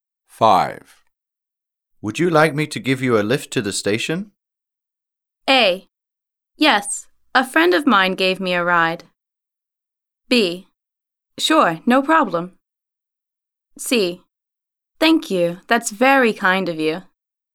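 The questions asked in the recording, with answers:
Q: Would you like me to give you a lift to the station?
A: C: Thank you, that's very kind of you.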